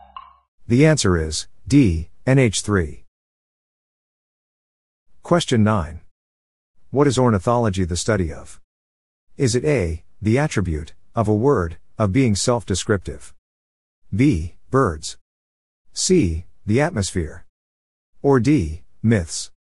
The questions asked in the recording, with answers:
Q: What is ornithology the study of?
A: The answer is B, birds.